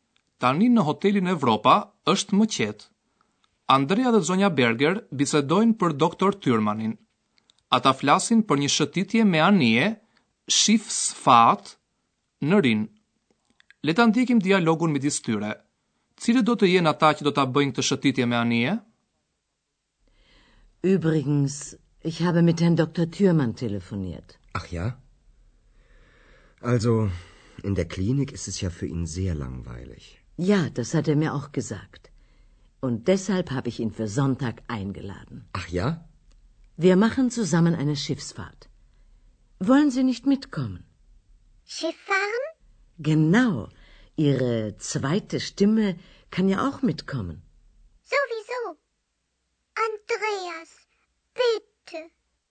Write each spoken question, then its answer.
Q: Cire do të jenë ata që do të bëjnë të shëtitje me anije?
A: Zonja Berger ka ftuar në këtë shëtitje doktor Tyrmanin.